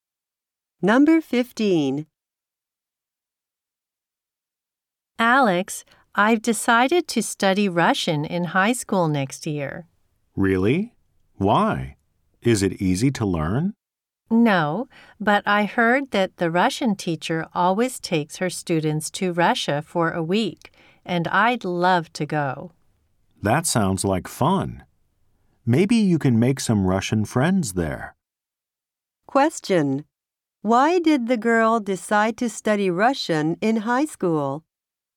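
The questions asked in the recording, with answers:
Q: Why did the girl decide to study Russian in high school?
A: The Russian teacher takes her students to Russia for a week.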